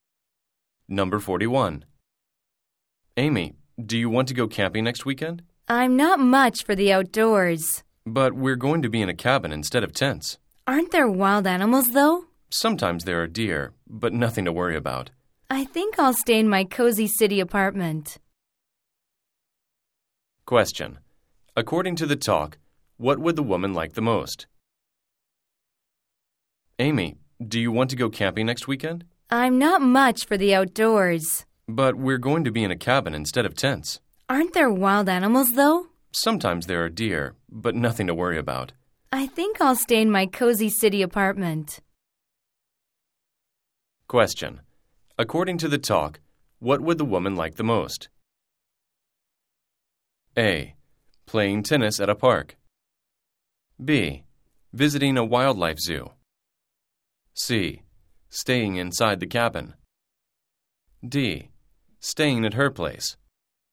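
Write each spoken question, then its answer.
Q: According to the talk, what would the woman like the most?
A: D: Staying at her place.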